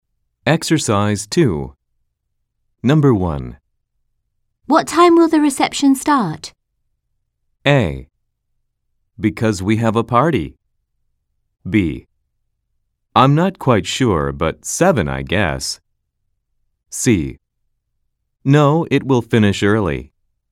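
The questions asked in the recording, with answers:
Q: What time will the reception start?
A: B: I'm not quite sure, but 7, I guess.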